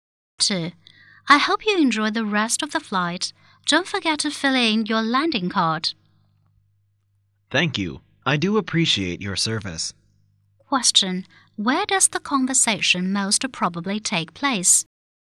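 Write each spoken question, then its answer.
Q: Where does the conversation most probably take place?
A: On a plane.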